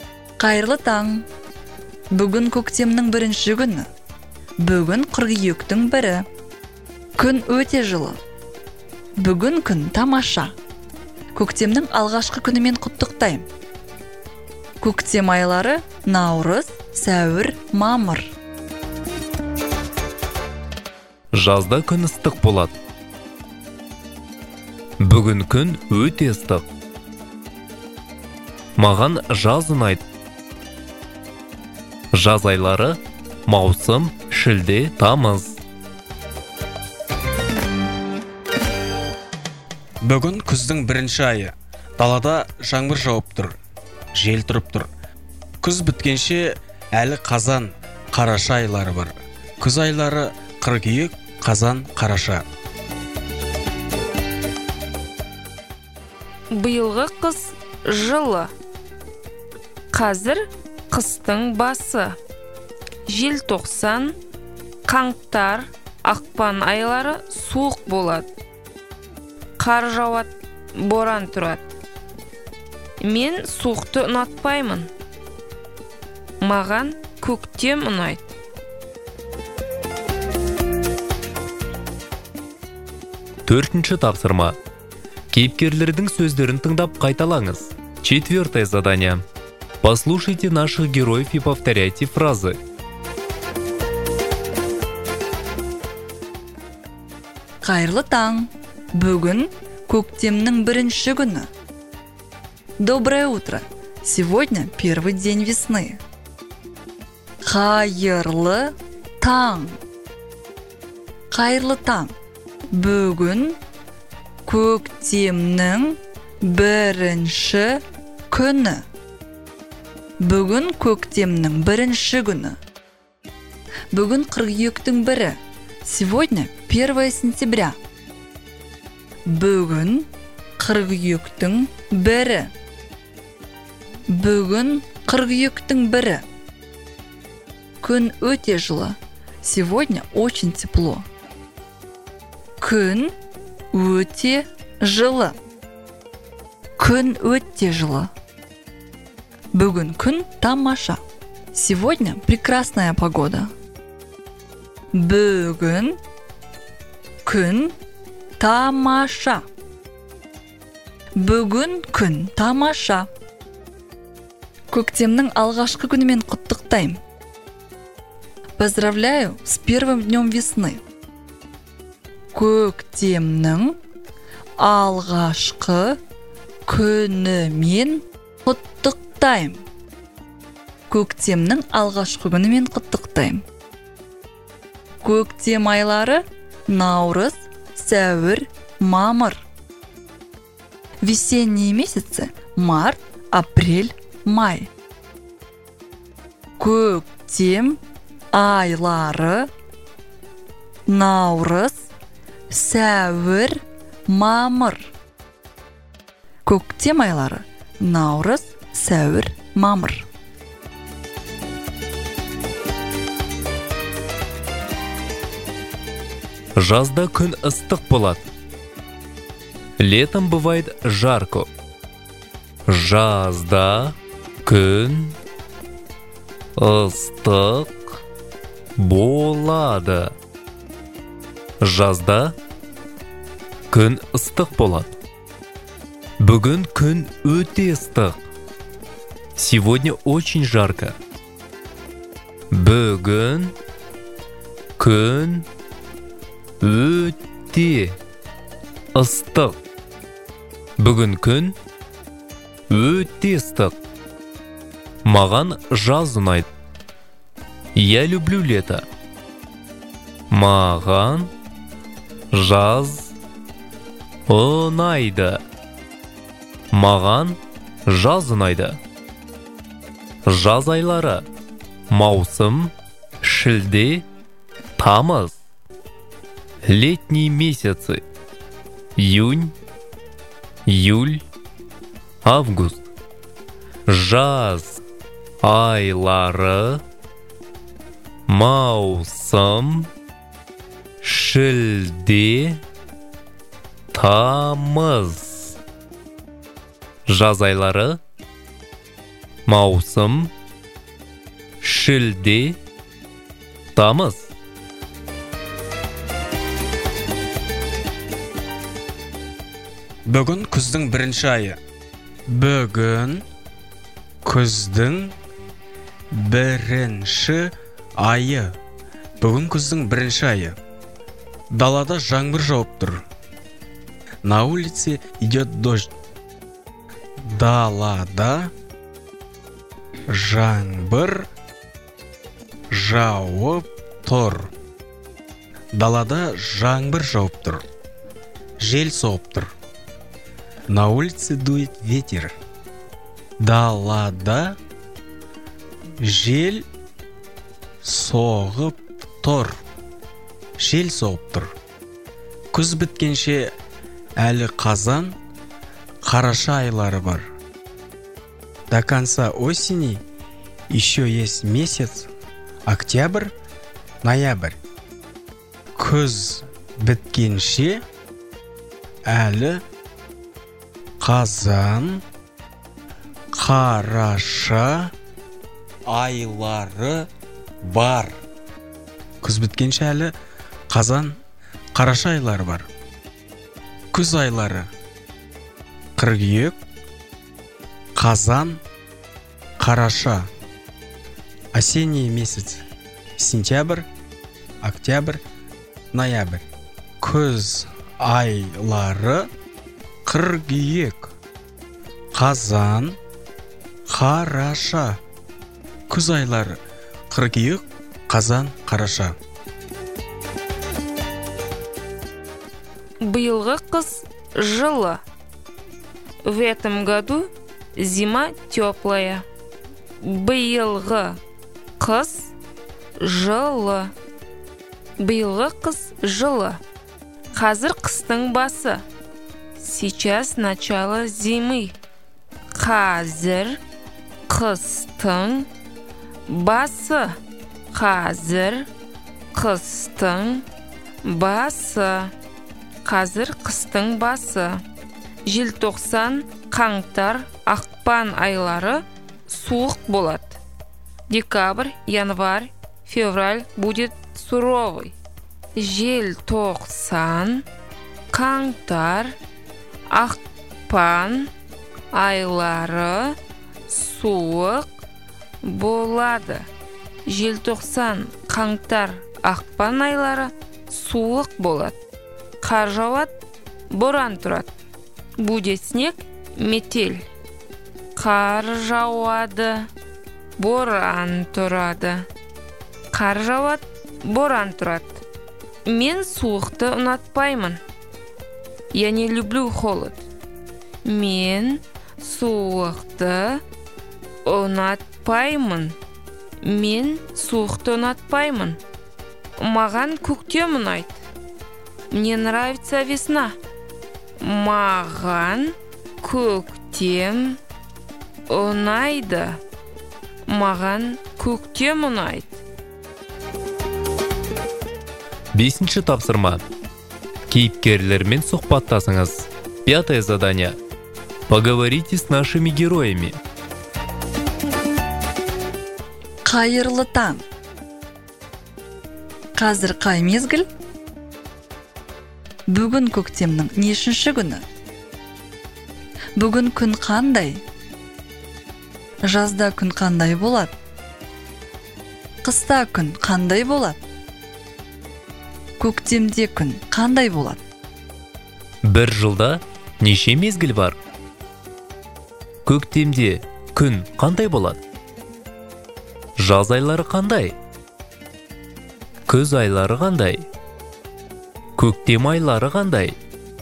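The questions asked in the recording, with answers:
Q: Жазда күн қандай болады?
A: Жазда күн ыстық болады

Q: Қыста күн қандай болады?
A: Суық болады, қар жауады, боран тұрады

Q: Жаз айлары қандай?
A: Маусым, шілде, тамыз

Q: Күз айлары қандай?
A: Қыркүйек, қазан, қараша

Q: Көктем айлары қандай?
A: Наурыз, сәуір, мамыр

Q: Қыс айлары қандай?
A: Желтоқсан, қаңтар, ақпан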